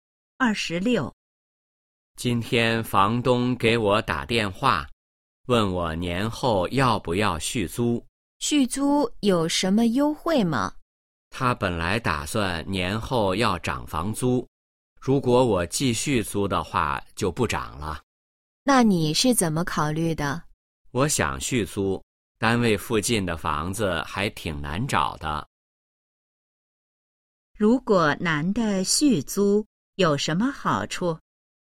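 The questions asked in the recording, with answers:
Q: 如果男的续租有什么好处?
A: 房租不涨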